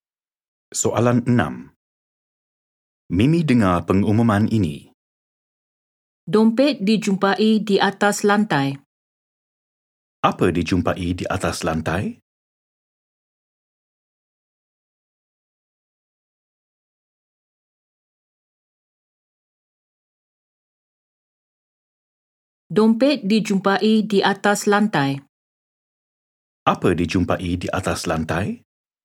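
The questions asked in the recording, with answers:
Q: Apa dijumpai di atas lantai?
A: dompet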